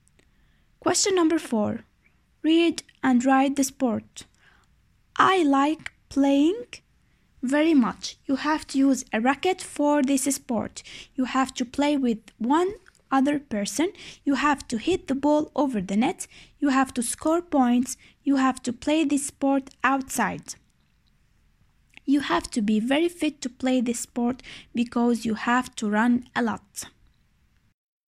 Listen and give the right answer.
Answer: The answer is tennis.